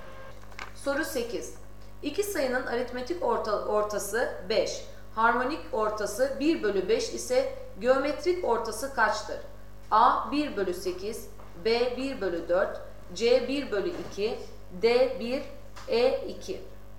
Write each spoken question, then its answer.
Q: Harmonik ortası 1 bölü 5 ise geometrik ortası kaçtır?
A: Doğru cevap D 1.